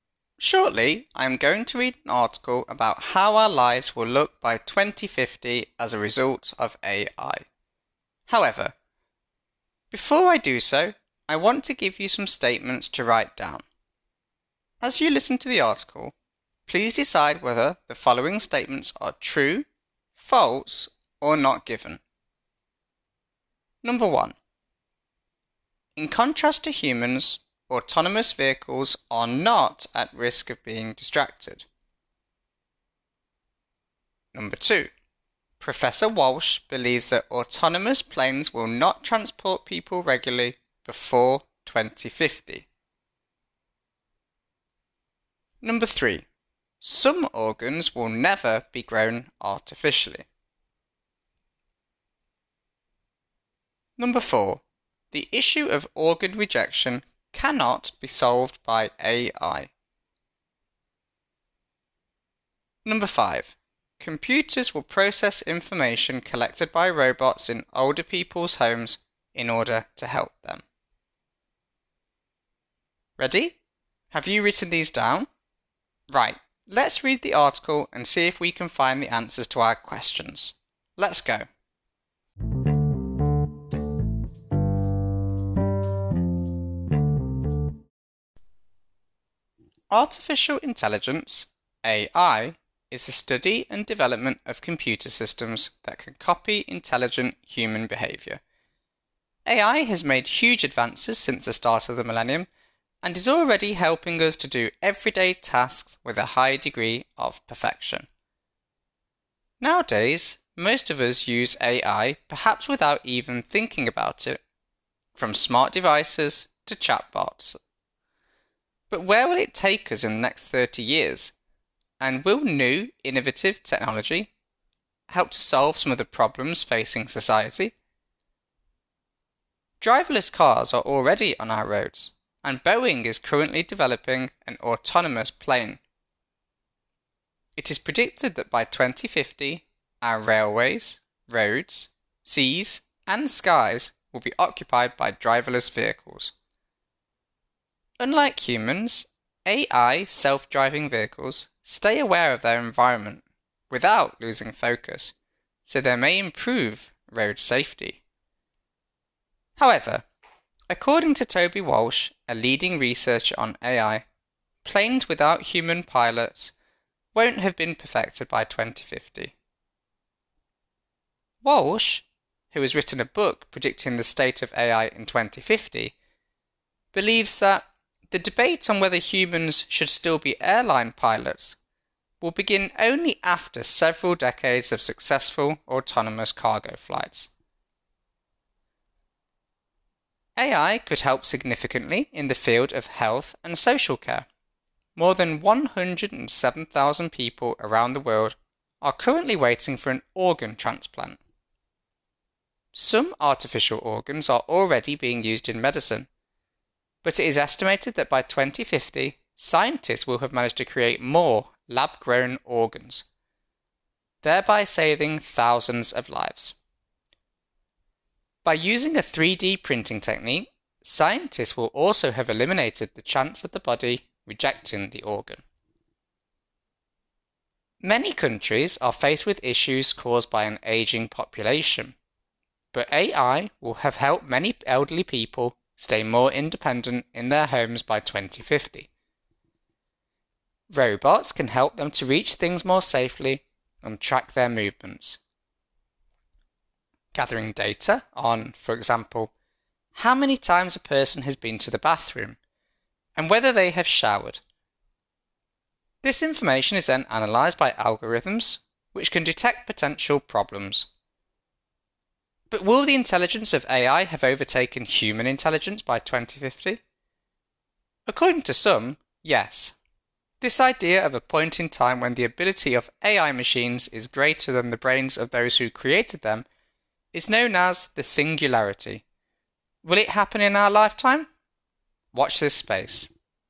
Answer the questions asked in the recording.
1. This is true.
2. This is also true.
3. In fact, this information is not given in the article.
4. This is false.
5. This is true.